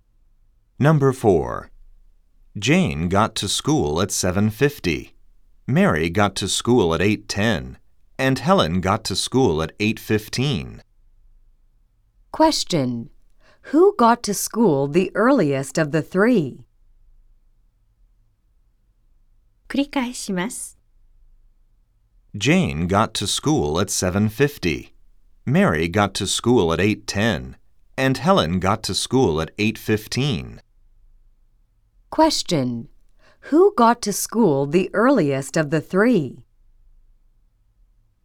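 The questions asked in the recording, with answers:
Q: Who got to school the earliest of the three?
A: Jane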